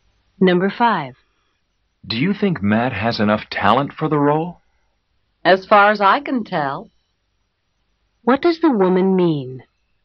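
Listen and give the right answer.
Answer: She thinks Matt has enough talent, but she isn't sure.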